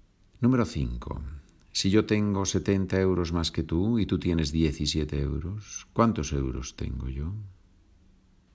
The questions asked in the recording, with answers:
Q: Si yo tengo 70 euros más que tú y tú tienes 17 euros, ¿cuántos euros tengo yo?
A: Tengo 87 euros